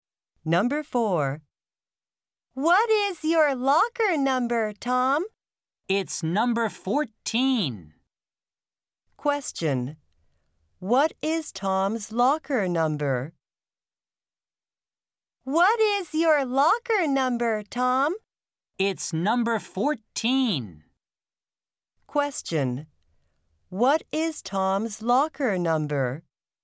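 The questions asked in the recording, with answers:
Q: What is Tom's locker number?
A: 14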